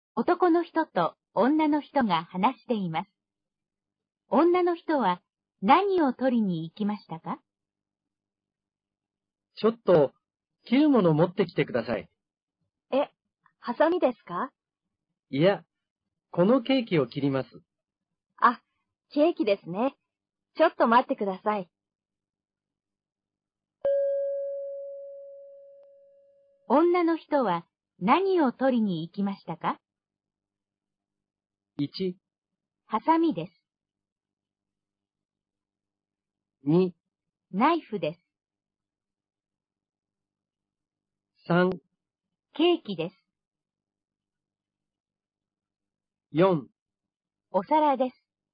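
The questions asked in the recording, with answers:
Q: 女の人は何を取りに行きましたか?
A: 2: ナイフです。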